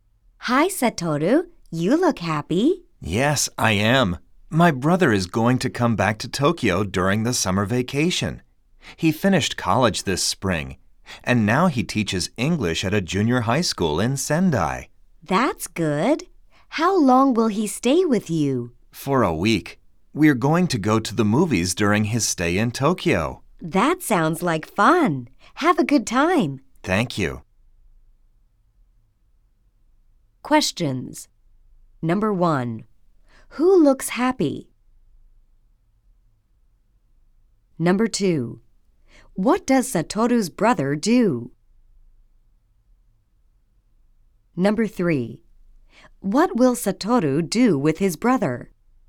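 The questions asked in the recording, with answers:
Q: Who looks happy?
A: Satoru

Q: What does Satoru's brother do?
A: He teaches English at a junior high school in Sendai.

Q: What will Satoru do with his brother?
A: They will go to the movies.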